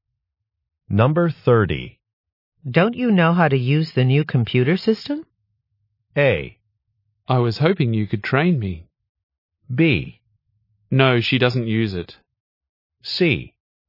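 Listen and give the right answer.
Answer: A: I was hoping you could train me.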